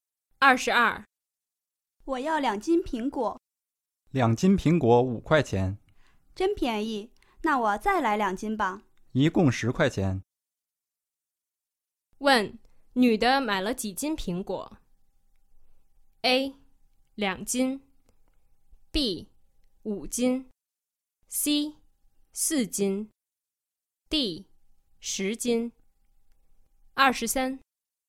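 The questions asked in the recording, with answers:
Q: 问,女的买了几斤苹果?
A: C: 4斤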